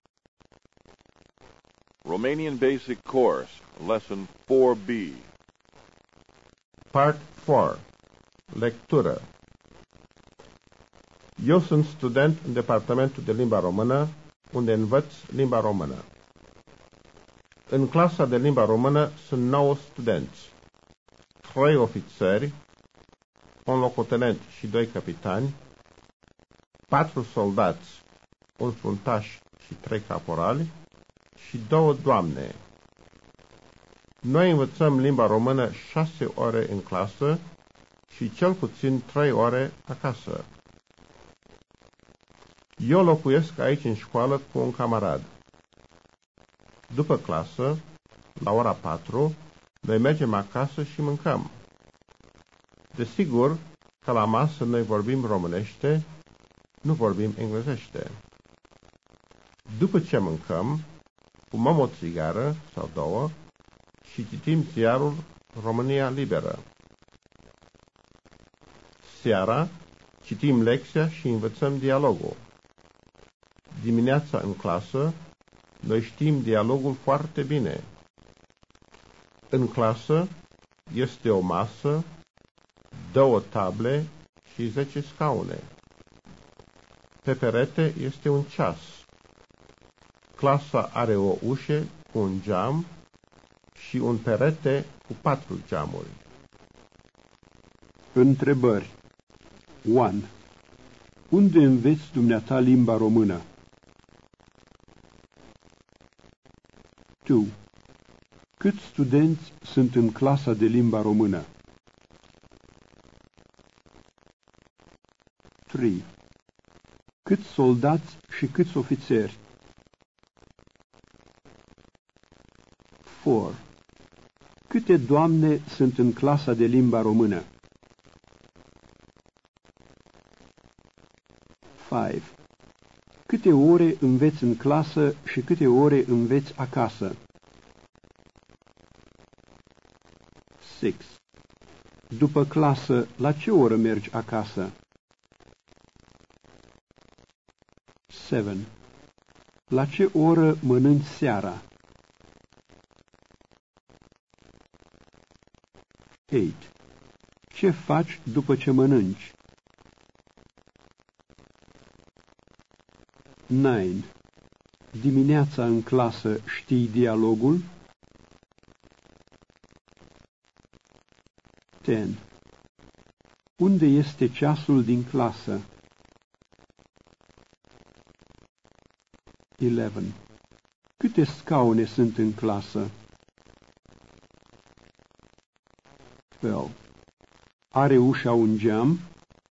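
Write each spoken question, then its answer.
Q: Unde înveți dumneata limba română?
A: În departamentul de limba română

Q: Câți studenți sunt în clasa de limba română?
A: 9 studenți

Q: Câte doamne sunt în clasa de limba română?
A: 2 doamne

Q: Câte ore înveți în clasă și câte ore înveți acasă?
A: 6 ore în clasă și cel puțin 3 ore acasă

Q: După clasă, la ce oră mergi acasă?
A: La ora 4

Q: Ce faci după ce mănânci?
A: Fumez o țigară sau două și citesc ziarul România Liberă

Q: Dimineața în clasă știi dialogul?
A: Da, foarte bine

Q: Unde este ceasul din clasă?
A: Pe perete

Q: Câte scaune sunt în clasă?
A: 10 scaune

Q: Are ușa un geam?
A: Da, ușa are un geam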